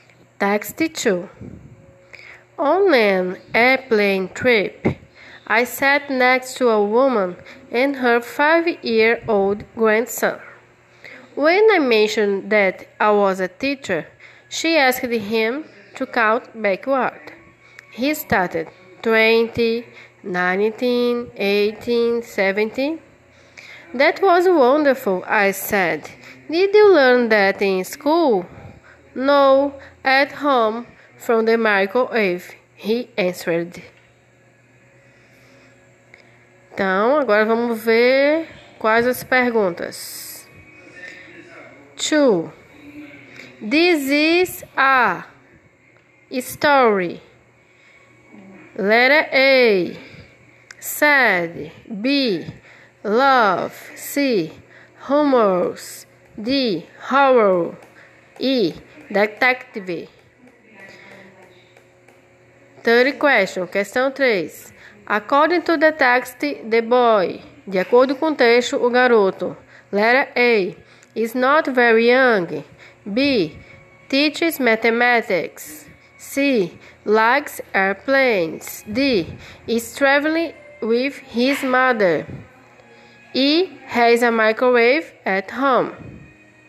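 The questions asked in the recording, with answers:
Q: This is a story.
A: C: Humorous

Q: According to the text, the boy.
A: E: Has a microwave at home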